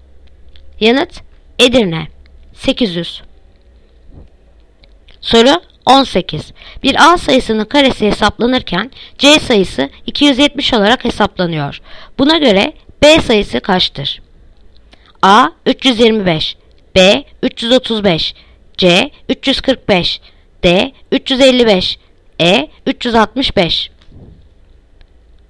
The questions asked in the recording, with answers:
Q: Buna göre B sayısı kaçtır?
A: Yanıt Edirne 365.